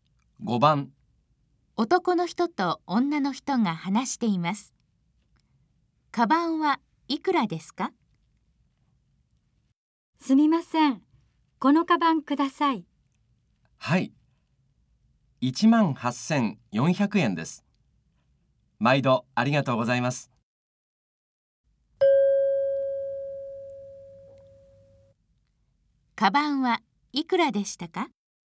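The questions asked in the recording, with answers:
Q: カバンはいくらでしたか?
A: 18,400円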